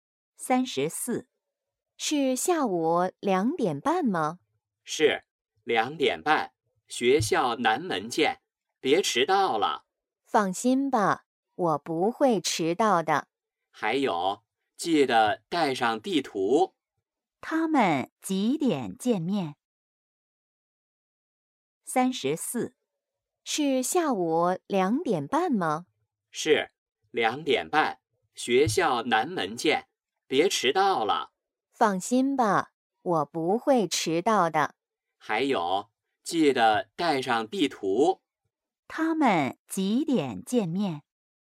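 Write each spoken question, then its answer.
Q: 他们几点见面?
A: 下午2:30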